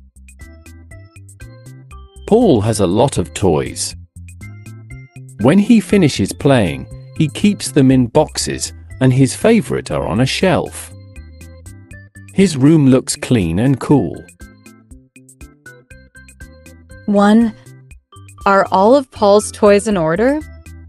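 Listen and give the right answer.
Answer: Yes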